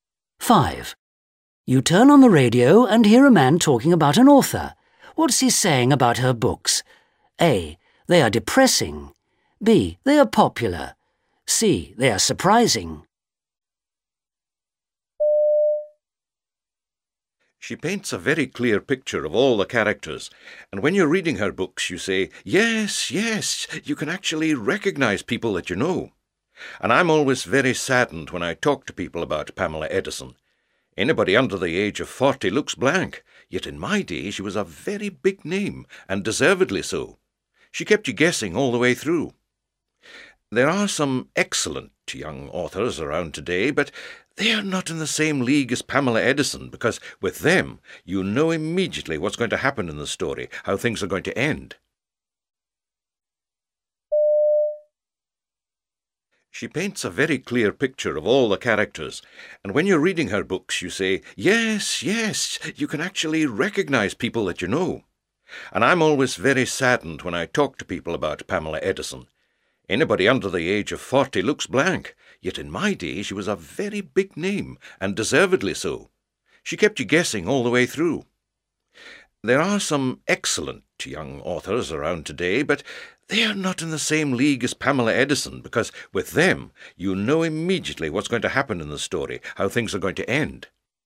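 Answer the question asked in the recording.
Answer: C: They are surprising.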